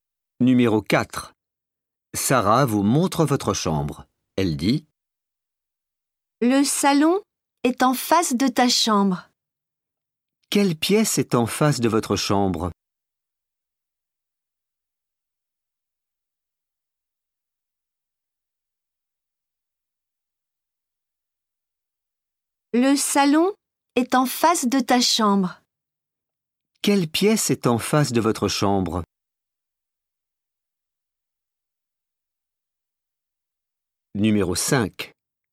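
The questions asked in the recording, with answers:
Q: Quelle pièce est en face de votre chambre?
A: Le salon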